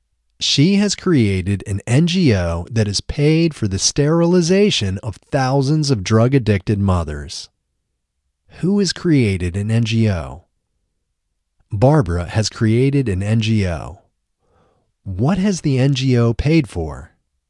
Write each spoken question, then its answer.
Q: What has the NGO paid for?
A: The NGO has paid for the sterilization of thousands of drug-addicted mothers.